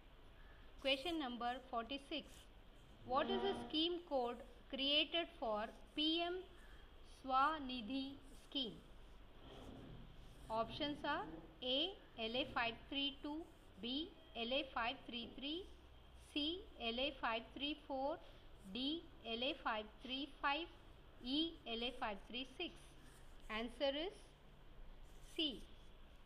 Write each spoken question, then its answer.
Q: What is the scheme code created for PM Swanidhi scheme?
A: Answer is C.